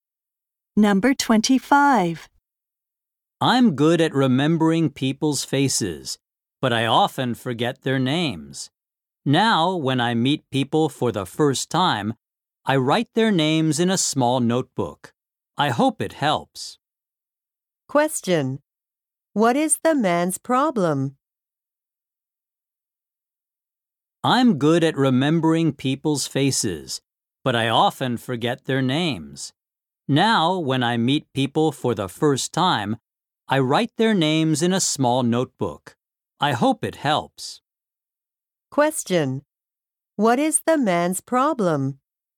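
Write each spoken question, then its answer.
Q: What is the man's problem?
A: He often forgets people's names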